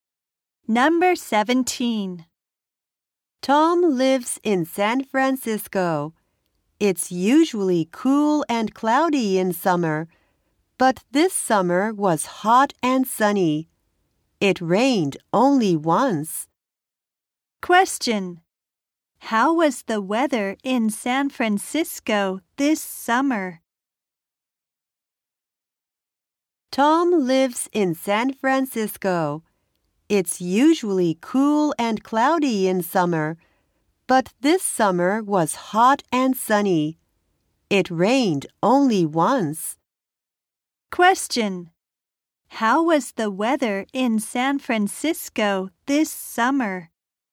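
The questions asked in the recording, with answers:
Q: How was the weather in San Francisco this summer?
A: Hot and sunny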